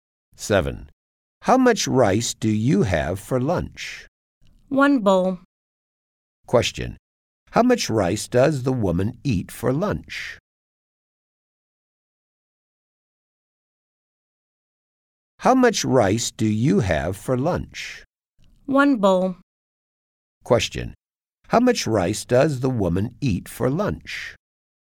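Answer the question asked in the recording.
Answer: One bowl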